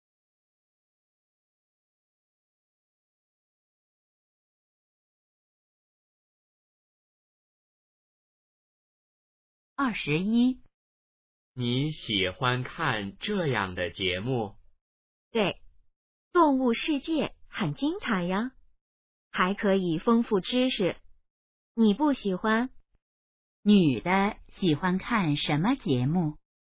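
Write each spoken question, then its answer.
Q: 女的喜欢看什么节目?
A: 动物世界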